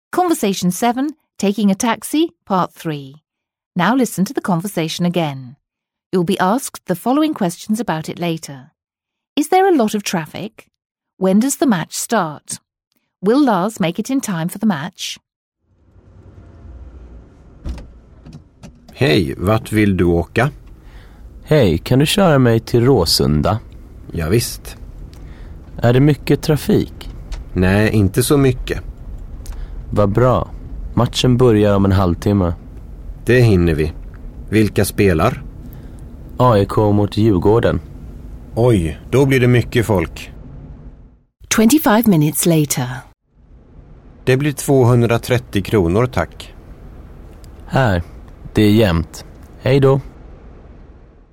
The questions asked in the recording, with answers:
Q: Is there a lot of traffic?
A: He says there's not so much traffic.

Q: When does the match start?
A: in half an hour

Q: Will Lars make it in time for the match?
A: yes, he will